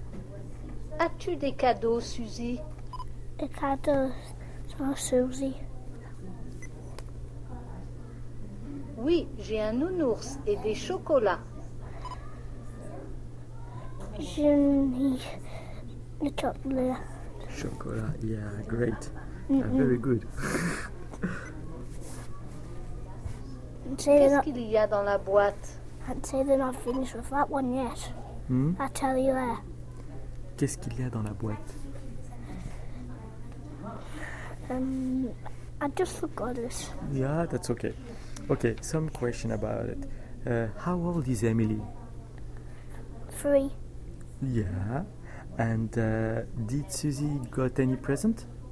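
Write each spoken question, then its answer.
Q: And did Susie got any present?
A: Yes, a teddy bear and chocolates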